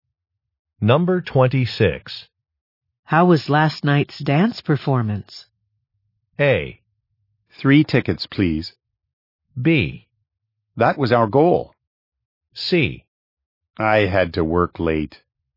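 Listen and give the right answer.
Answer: C: I had to work late.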